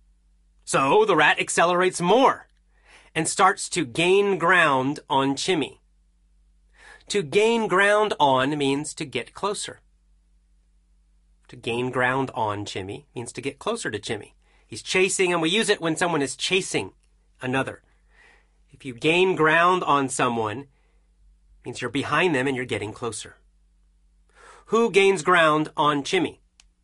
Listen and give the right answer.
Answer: The rat. The rat gains ground on Chimmy.